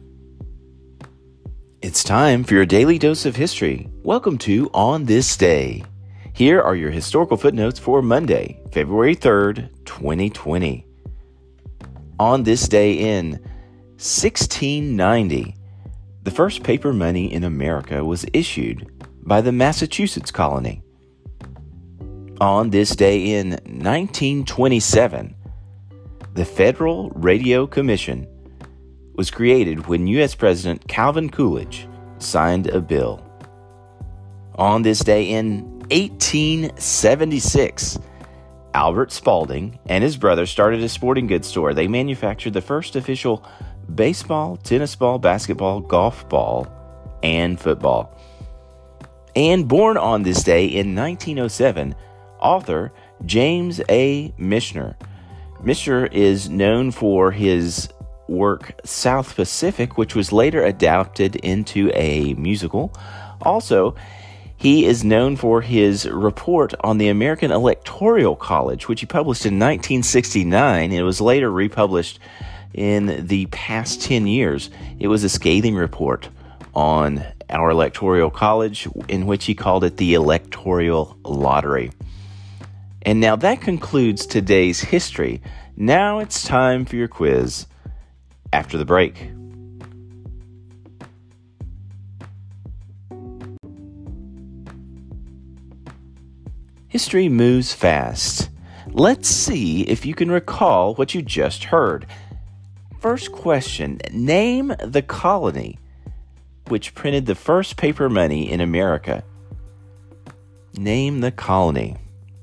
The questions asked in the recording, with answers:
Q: First question, name the colony which printed the first paper money in America.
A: The colony to print the first paper money in America was the Massachusetts colony.